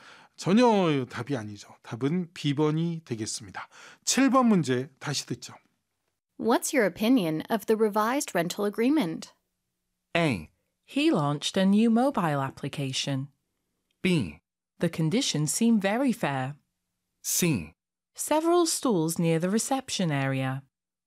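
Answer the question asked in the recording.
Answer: B: The conditions seem very fair.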